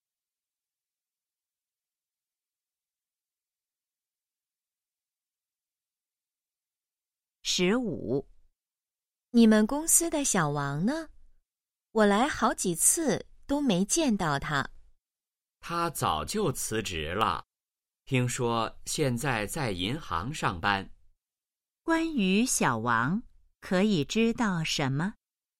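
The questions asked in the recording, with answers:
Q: 关于小王,可以知道什么?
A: 他辞职了,现在在银行上班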